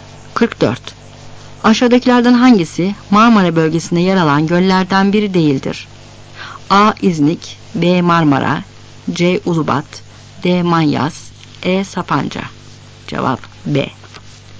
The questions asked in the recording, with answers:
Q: Aşağıdakilerden hangisi Marmara bölgesinde yer alan göllerden biri değildir?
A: Cevap B.